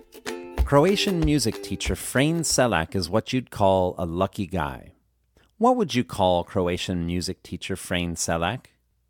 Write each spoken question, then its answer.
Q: What would you call Croatian music teacher Frane Selak?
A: You would call Croatian music teacher Frane Selak a lucky guy.